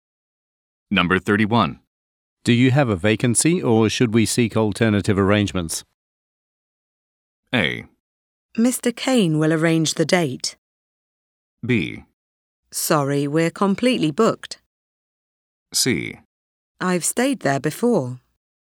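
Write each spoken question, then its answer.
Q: Do you have a vacancy or should we seek alternative arrangements?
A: B: Sorry, we're completely booked.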